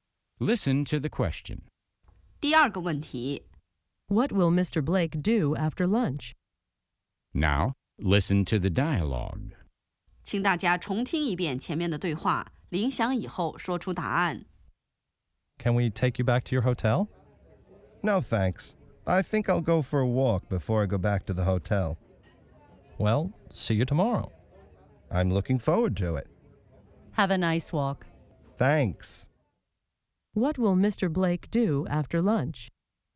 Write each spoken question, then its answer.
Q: What will Mr. Blake do after lunch?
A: He'll go for a walk.